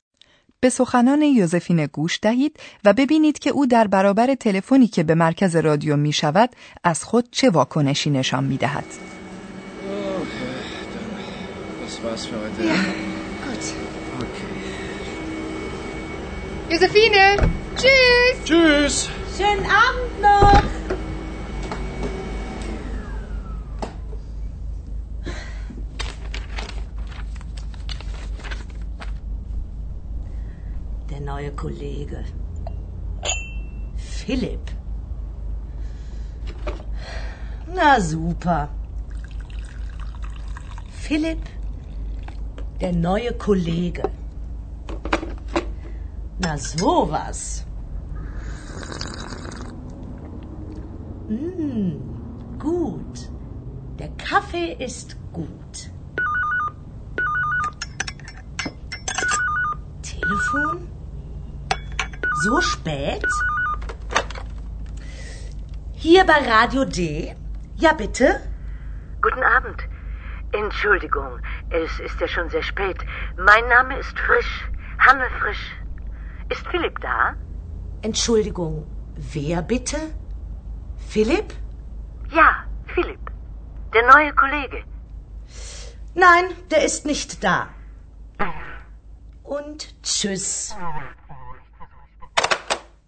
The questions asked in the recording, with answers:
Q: به سخنان یوزفین گوش دهید و ببینید که او در برابر تلفنی که به مرکز رادیو می شود از خود چه واکنشی نشان می دهد.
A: حتما متوجه شدید که یوزفینه عمدن نقش یک آدم بیگناه و بیخبر را بازی می کند.